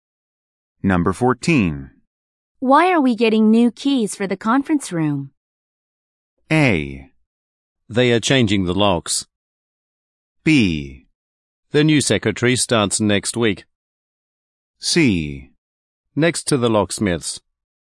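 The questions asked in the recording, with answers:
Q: Why are we getting new keys for the conference room?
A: A: They are changing the locks.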